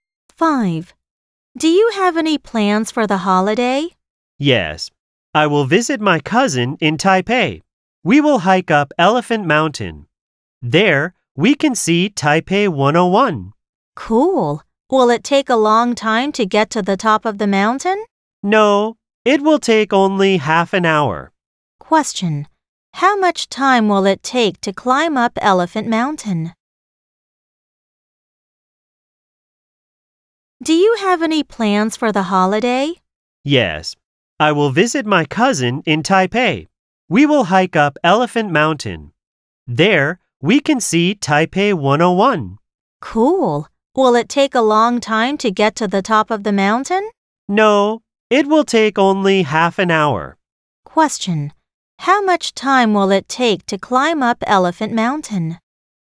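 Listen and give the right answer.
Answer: Half an hour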